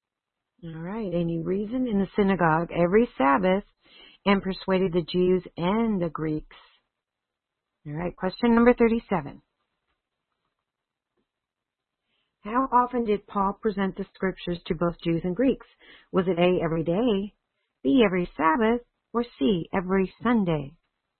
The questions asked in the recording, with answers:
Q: How often did Paul present the scriptures to both Jews and Greeks?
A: Very good. The answer is B, every Sabbath.